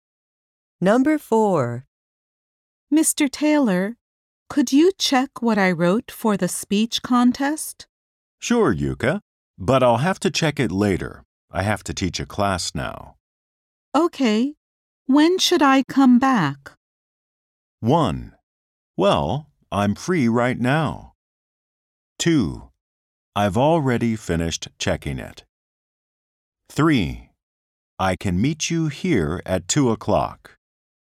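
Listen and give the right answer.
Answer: 3: I can meet you here at 2:00.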